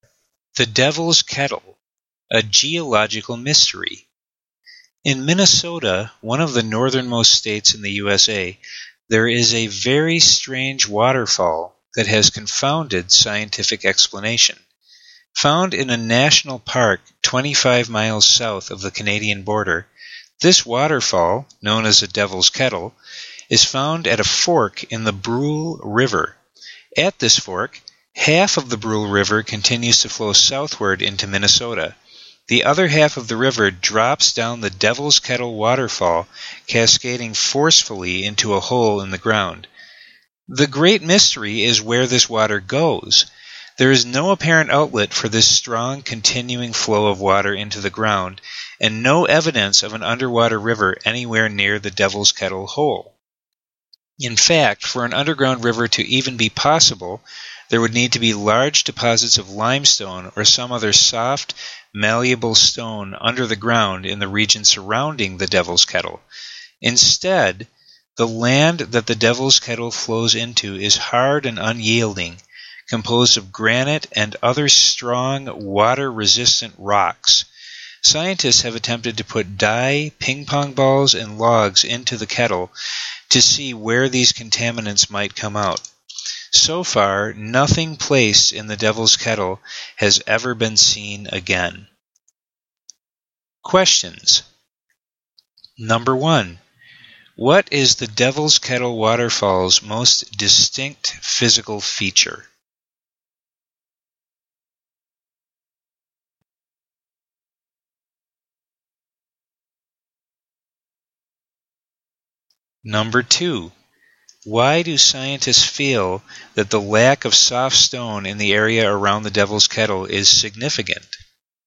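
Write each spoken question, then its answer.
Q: What is the Devil's Kettle waterfall's most distinct physical feature?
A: Half of the river drops into a hole in the ground with no apparent outlet

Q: Why do scientists feel that the lack of soft stone in the area around the Devil's Kettle is significant?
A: An underground river would need soft stone like limestone, so hard granite makes one unlikely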